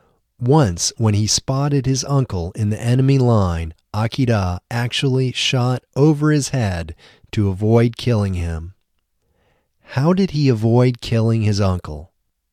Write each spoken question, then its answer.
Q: How did he avoid killing his uncle?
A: He avoided killing his uncle by shooting over his head.